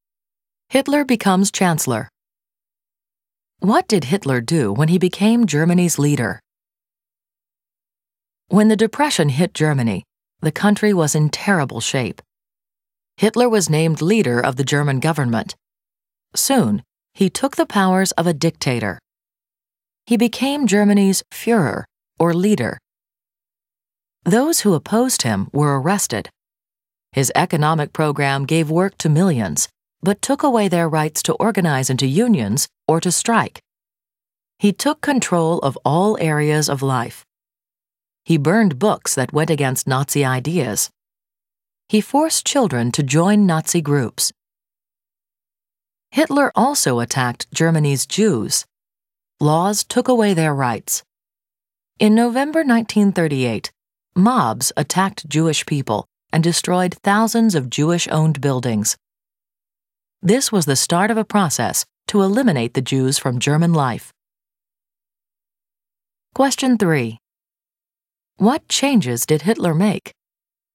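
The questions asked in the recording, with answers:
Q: What changes did Hitler make?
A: He became dictator, arrested opponents, banned unions and strikes, controlled all areas of life, burned books, forced children into Nazi groups, and attacked Jews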